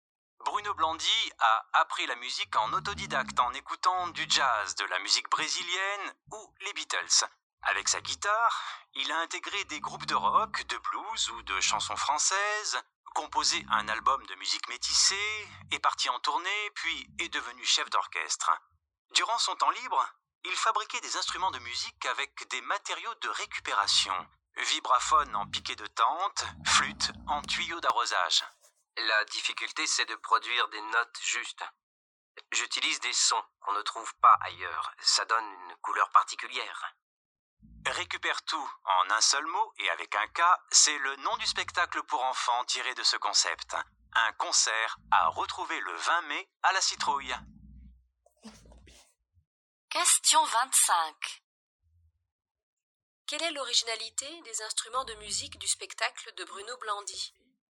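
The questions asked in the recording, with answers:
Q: Quelle est l'originalité des instruments de musique du spectacle de Bruno Blandy ?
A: Ils sont fabriqués avec des matériaux de récupération.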